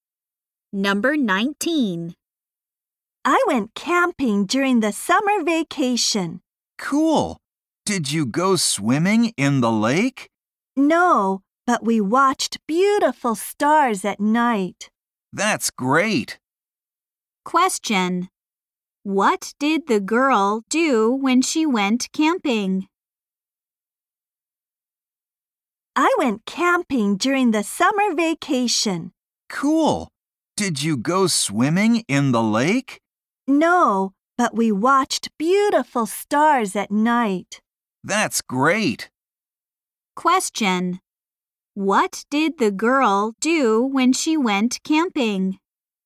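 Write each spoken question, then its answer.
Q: What did the girl do when she went camping?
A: She watched the stars at night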